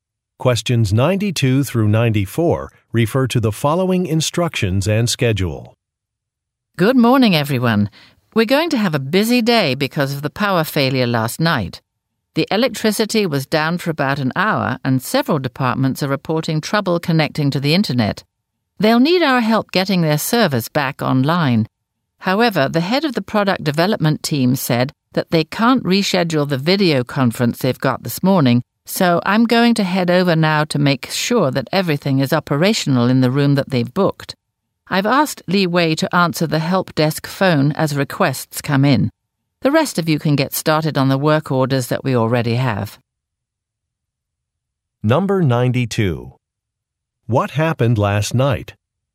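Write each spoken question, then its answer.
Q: What happened last night?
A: A power failure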